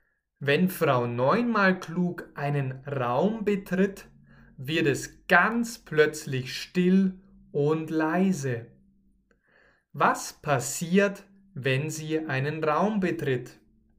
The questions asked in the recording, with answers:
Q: Was passiert, wenn sie einen Raum betritt?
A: Dann wird es plötzlich still und leise.